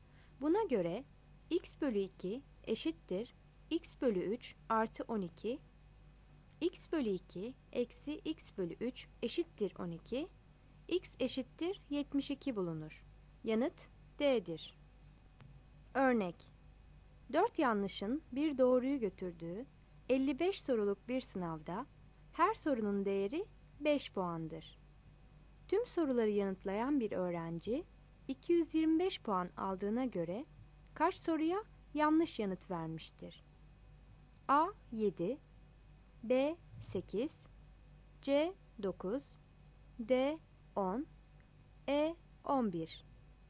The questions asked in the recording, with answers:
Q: Tüm soruları yanıtlayan bir öğrenci 225 puan aldığına göre kaç soruya yanlış yanıt vermiştir?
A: Yanıt B'dir.